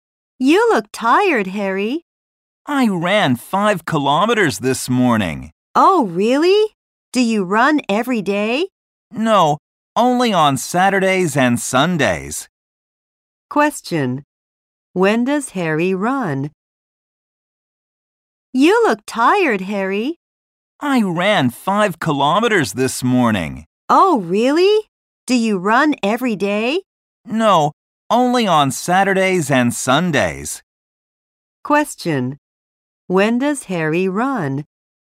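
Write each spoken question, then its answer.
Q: When does Harry run?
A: Only on Saturdays and Sundays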